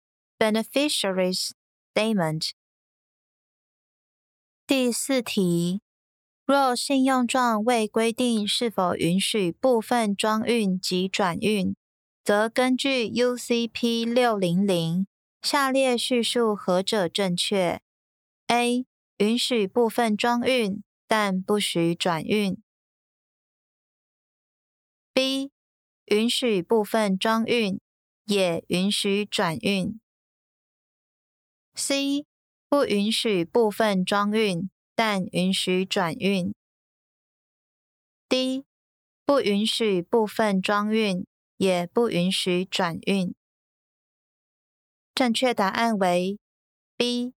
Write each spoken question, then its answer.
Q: 若信用状未规定是否允许部分装运及转运则根据 UCP 600下列叙述何者正确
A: 正确答案为 B.